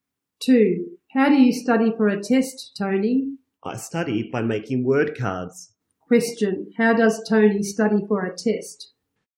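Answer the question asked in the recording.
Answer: By making word cards.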